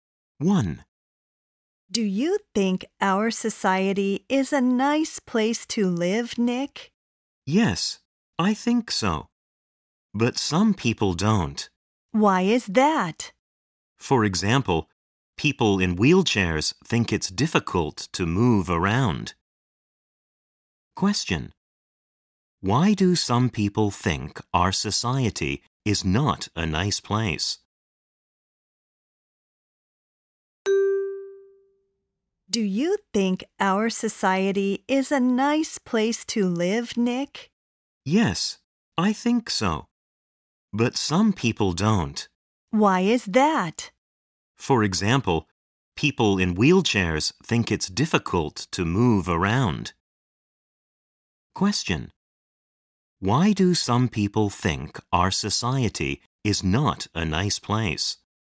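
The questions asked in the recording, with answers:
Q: Why do some people think our society is not a nice place?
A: Because people in wheelchairs think it's difficult to move around.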